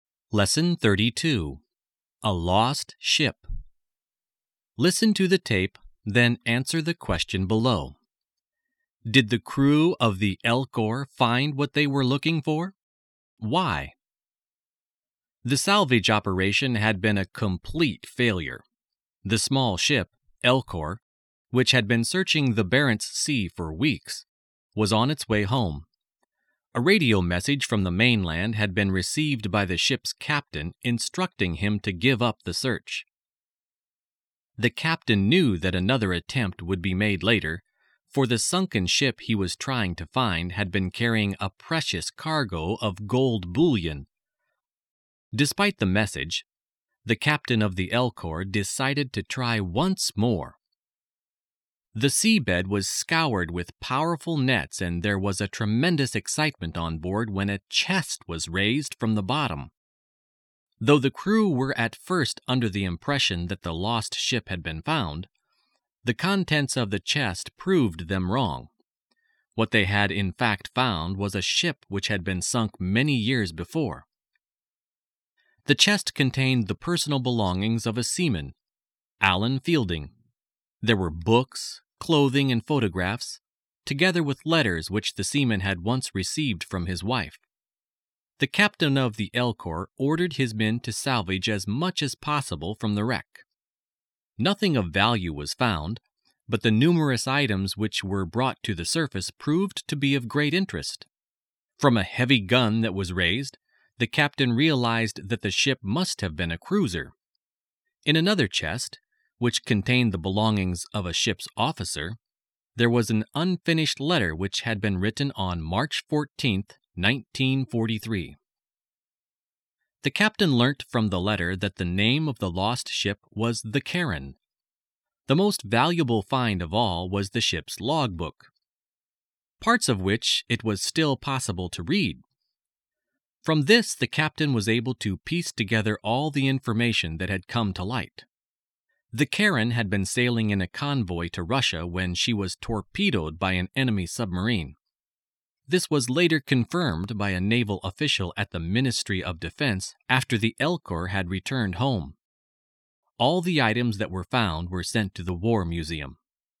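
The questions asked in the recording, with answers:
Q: Did the crew of the Elcor find what they were looking for?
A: No, they found an old sunken cruiser, the Charon, not the ship with the gold.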